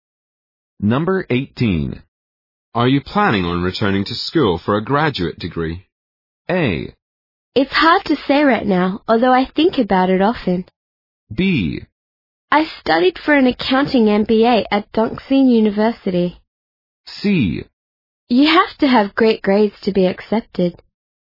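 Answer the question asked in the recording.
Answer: A: It's hard to say right now, although I think about it often.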